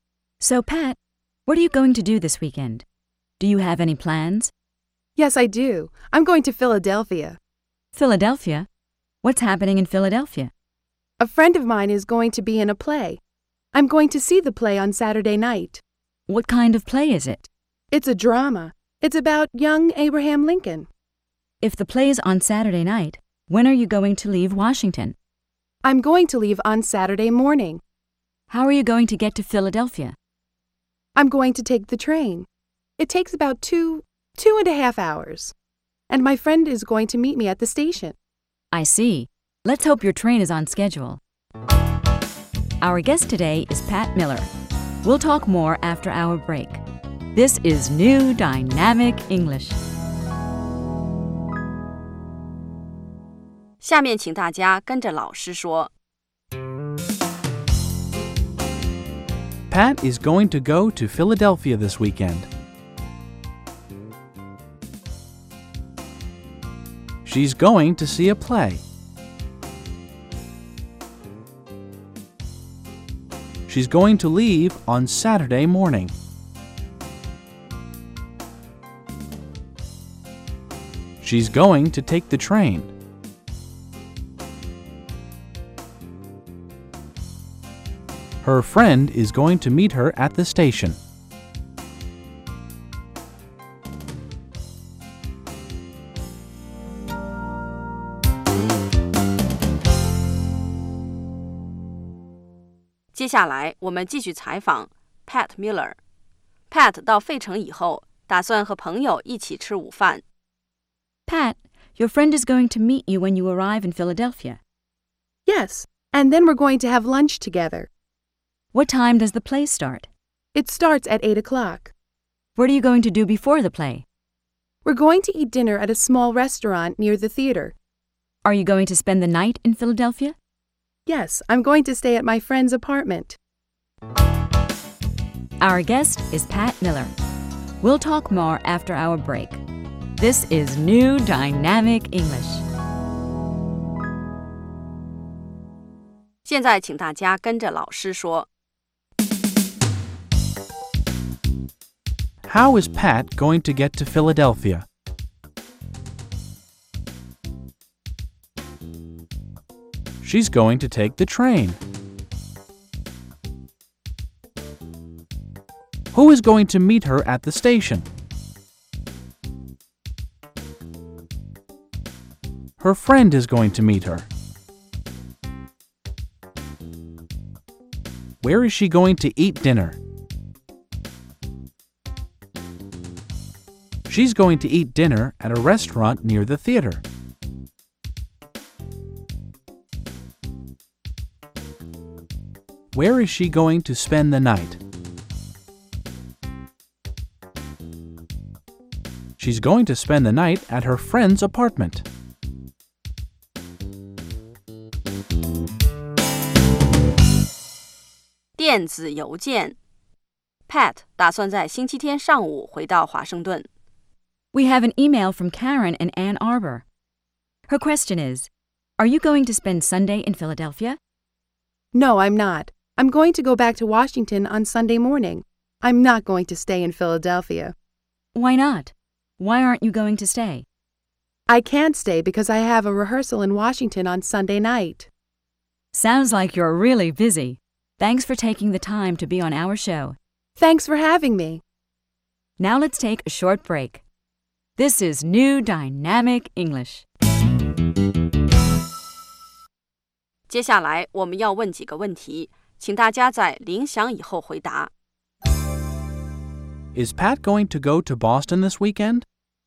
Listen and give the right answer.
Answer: No, she isn't. She isn't going to go to Boston.